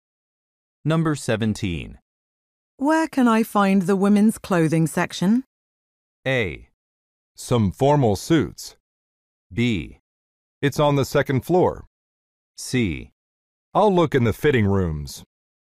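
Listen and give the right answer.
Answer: B: It's on the second floor.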